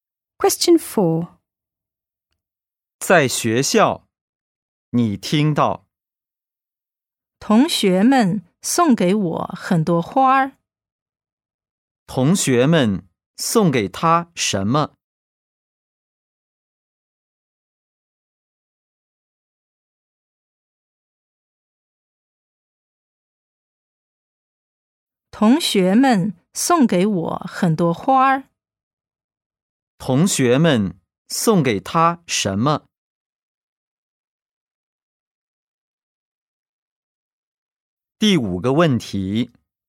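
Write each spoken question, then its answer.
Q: 同学们送给他什么?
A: 很多花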